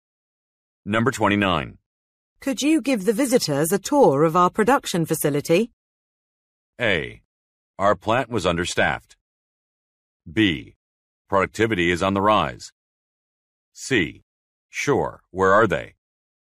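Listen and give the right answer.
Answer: C: Sure, where are they?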